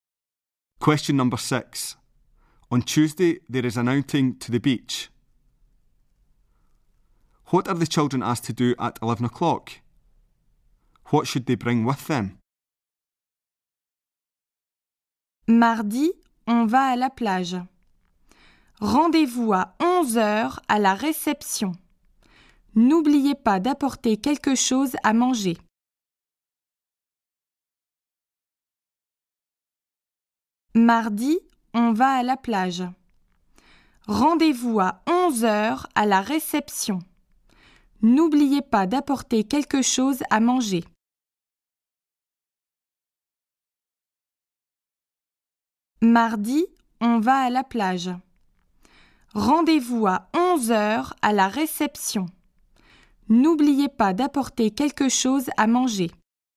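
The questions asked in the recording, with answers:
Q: What are the children asked to do at 11 o'clock?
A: Meet at reception

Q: What should they bring with them?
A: Something to eat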